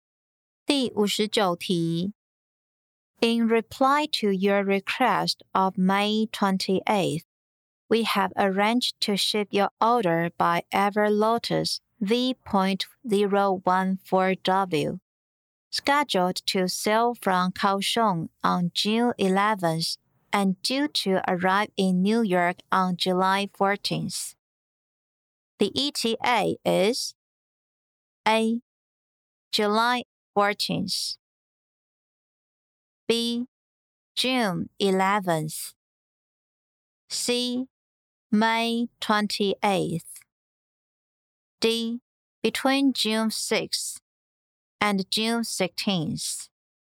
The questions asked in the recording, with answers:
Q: The ETA is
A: 正确答案为 A. July 14th.